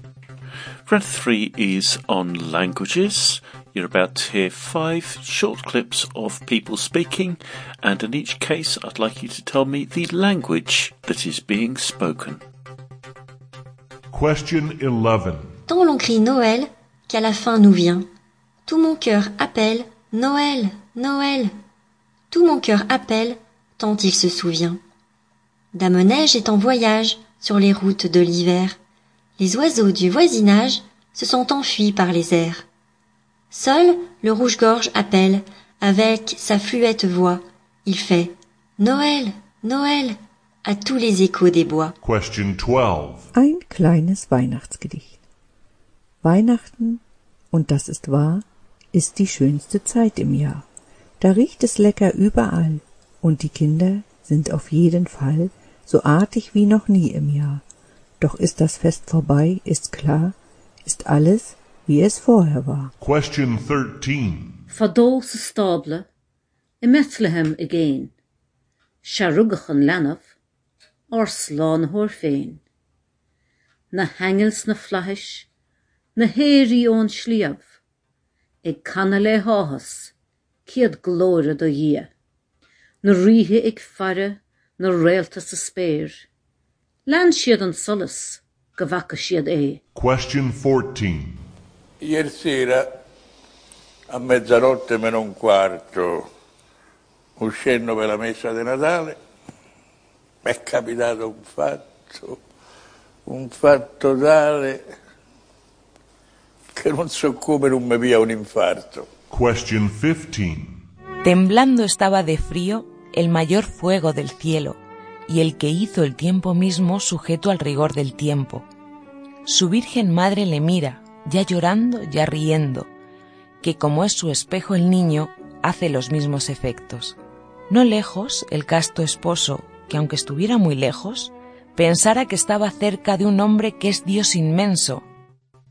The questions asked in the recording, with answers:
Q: I'd like you to tell me the language that is being spoken.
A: the answer to number 11 was French.

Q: I'd like you to tell me the language that is being spoken.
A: Number 12 was German.

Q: I'd like you to tell me the language that is being spoken.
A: Number 13 was Irish or Gaelic.

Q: I'd like you to tell me the language that is being spoken.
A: Number 14 was Italian.

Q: I'd like you to tell me the language that is being spoken.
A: And number 15 was Spanish.